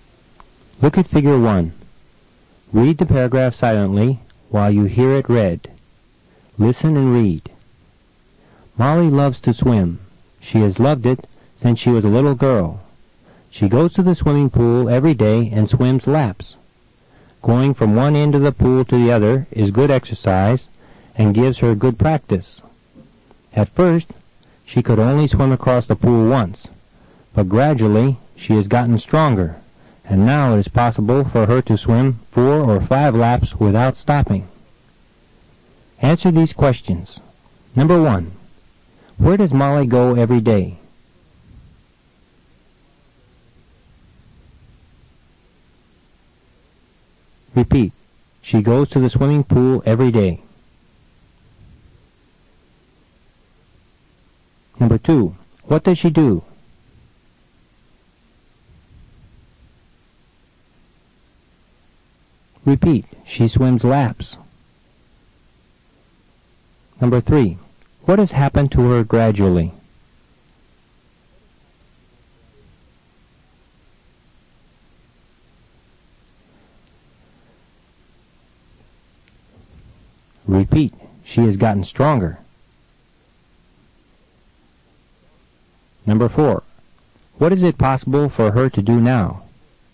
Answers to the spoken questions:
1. She goes to the swimming pool every day.
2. She swims laps.
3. She has gotten stronger.
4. Now it is possible for her to swim 4 or 5 laps without stopping.